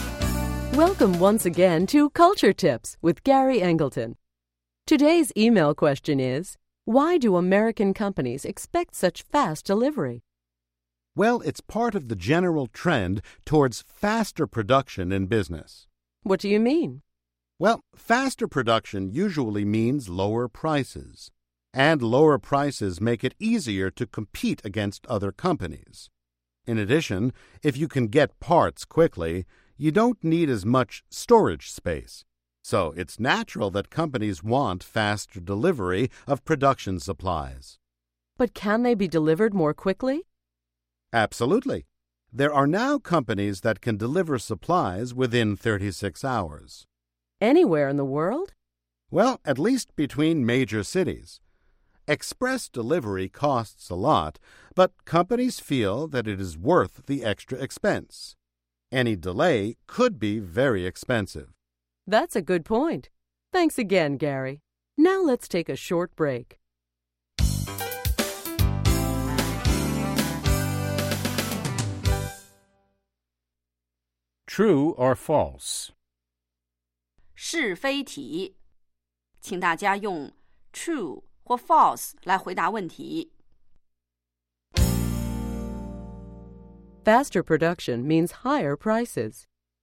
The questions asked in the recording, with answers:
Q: Faster production means higher prices.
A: False. Faster production usually means lower prices.